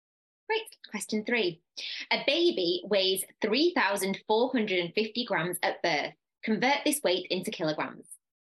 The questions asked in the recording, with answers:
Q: A baby weighs 3,450 grams at birth. Convert this weight into kilograms.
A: that will give you 3.45 kilograms